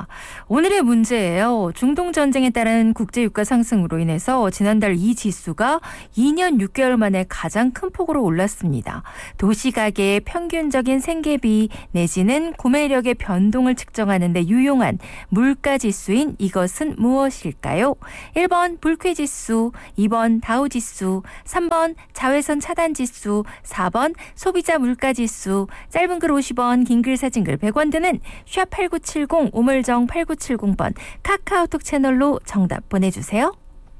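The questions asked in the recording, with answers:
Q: 도시가계의 평균적인 생계비 내지는 구매력의 변동을 측정하는 데 유용한 물가지수인 이것은 무엇일까요?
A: 4: 소비자 물가지수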